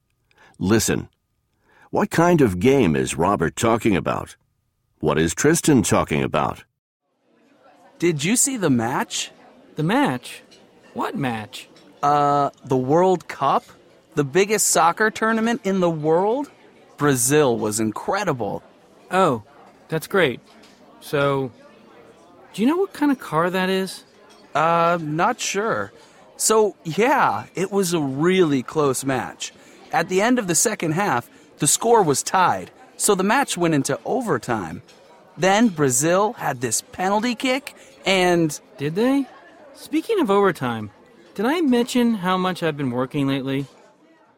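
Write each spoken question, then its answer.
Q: What kind of game is Robert talking about?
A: A soccer match (the World Cup)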